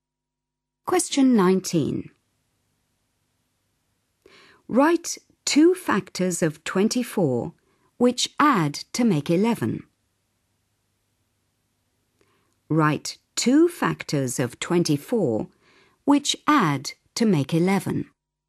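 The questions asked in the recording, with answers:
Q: Write 2 factors of 24 which add to make 11.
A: 3 and 8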